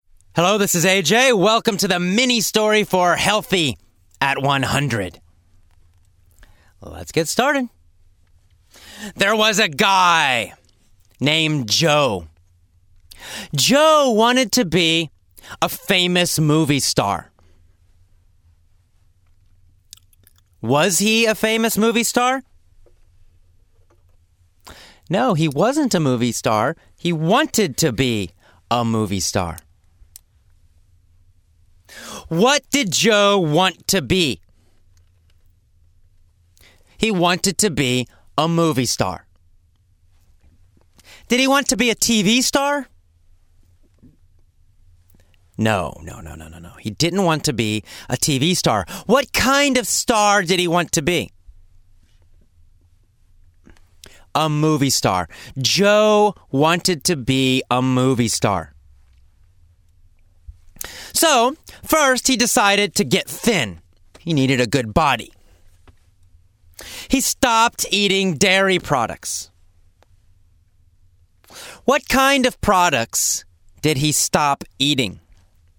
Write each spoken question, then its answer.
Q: What kind of products did he stop eating?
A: Well, dairy products. He stopped eating dairy products.